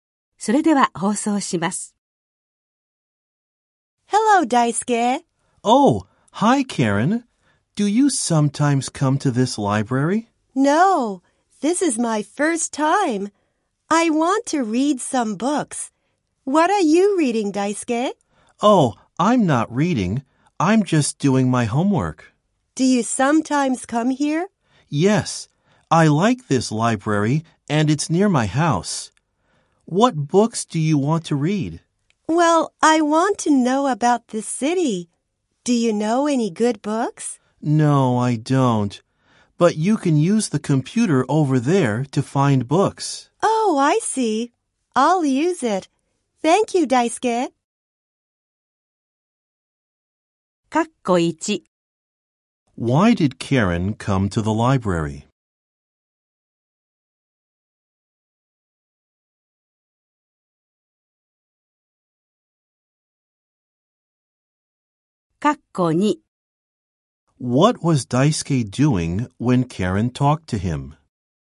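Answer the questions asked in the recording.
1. To read some books (about the city)
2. He was doing his homework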